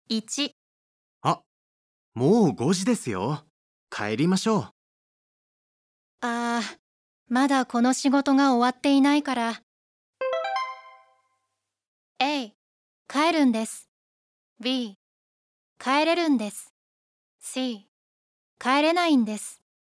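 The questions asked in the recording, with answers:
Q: ああ、まだこの仕事が終わっていないから。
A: C: 帰れないんです。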